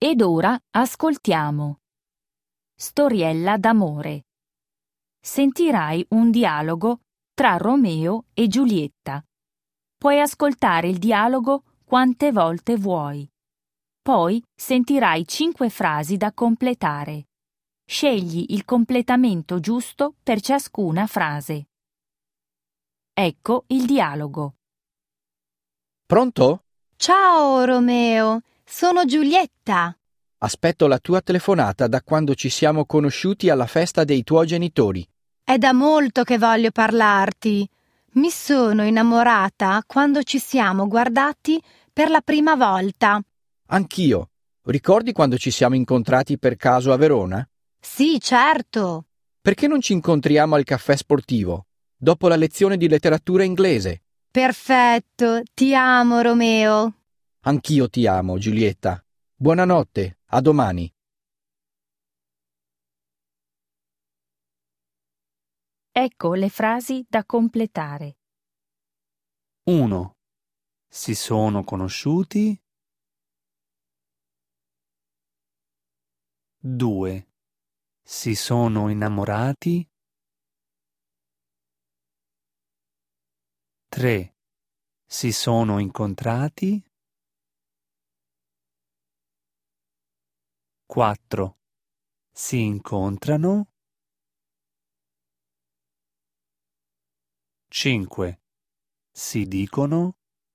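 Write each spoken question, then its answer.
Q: Si sono conosciuti.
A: alla festa dei genitori di Romeo

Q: Si sono innamorati.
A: quando si sono guardati per la prima volta

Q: Si sono incontrati.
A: per caso a Verona

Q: Si incontrano.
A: al caffè sportivo, dopo la lezione di letteratura inglese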